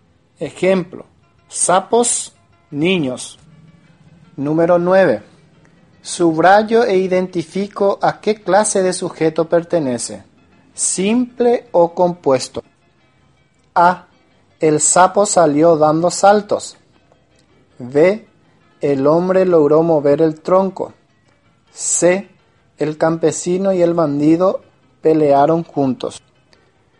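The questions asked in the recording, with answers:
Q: A. El sapo salió dando saltos.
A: sujeto simple

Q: B. El hombre logró mover el tronco.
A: sujeto simple

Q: C. El campesino y el bandido pelearon juntos.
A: sujeto compuesto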